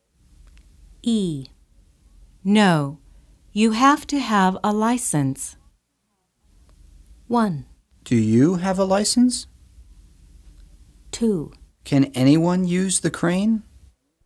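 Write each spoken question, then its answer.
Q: No, you have to have a license.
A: 2: Can anyone use the crane?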